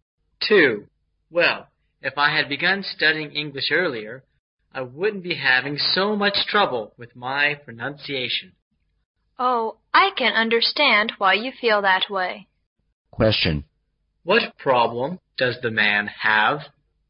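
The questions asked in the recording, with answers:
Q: What problem does the man have?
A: He has trouble with his English pronunciation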